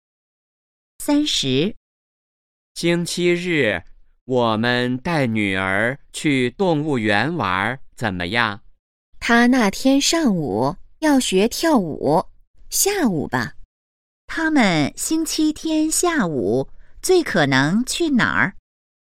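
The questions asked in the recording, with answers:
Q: 他们星期天下午最可能去哪儿?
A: 动物园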